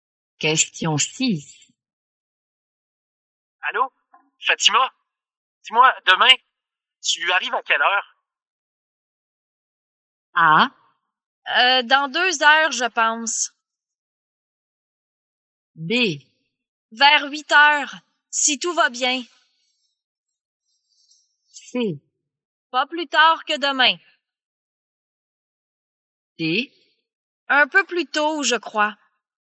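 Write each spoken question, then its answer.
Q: Allô? Fatima? Dis-moi, demain, tu arrives à quelle heure?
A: B: Vers 8 heures, si tout va bien.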